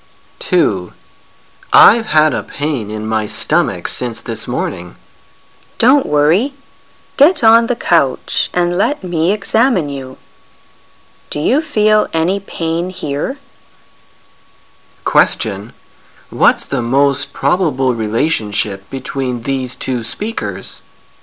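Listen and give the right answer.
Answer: Doctor and patient

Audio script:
[解析] M: I've had a pain in my stomach since this morning. W: Don't worry! Get on the couch and let me examine you. Do you feel any pain here? Q: What's the most probable relationship between these two speakers?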